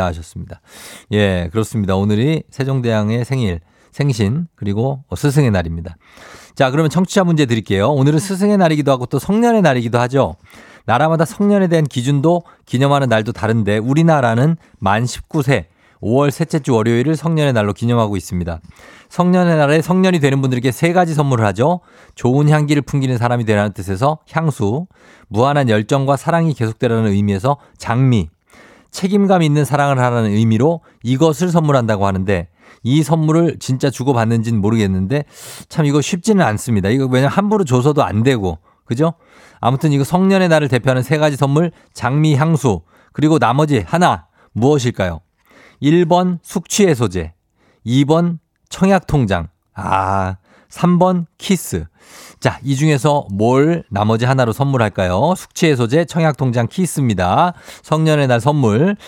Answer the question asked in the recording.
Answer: 정답은 키스죠, 키스.